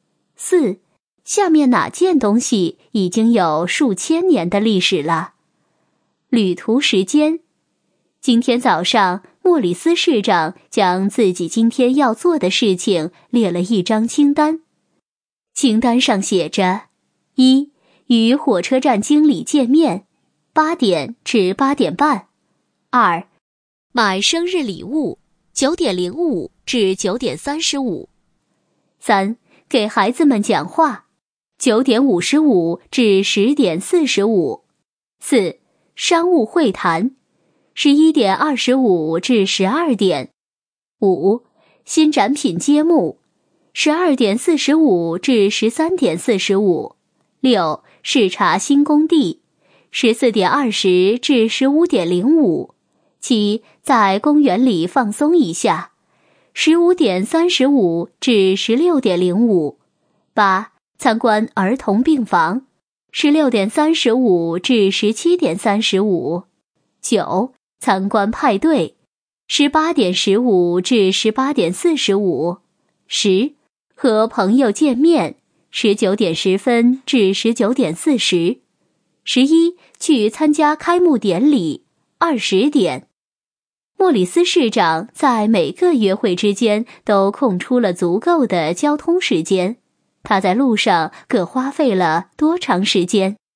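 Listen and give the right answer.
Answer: 依次为35分钟、20分钟、40分钟、45分钟、35分钟、30分钟、30分钟、40分钟、25分钟、20分钟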